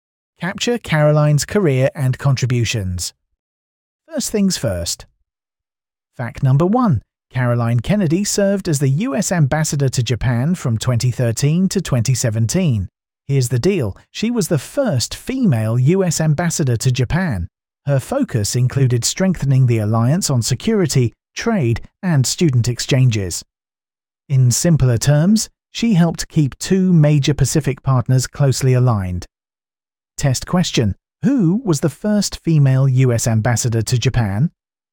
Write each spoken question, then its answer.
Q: Who was the first female US ambassador to Japan?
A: Correct answer, Caroline Kennedy.